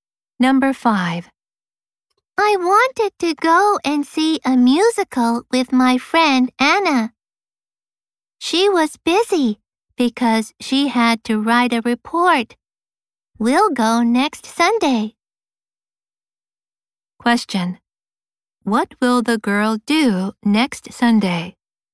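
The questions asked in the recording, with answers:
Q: What will the girl do next Sunday?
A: Go and see a musical with Anna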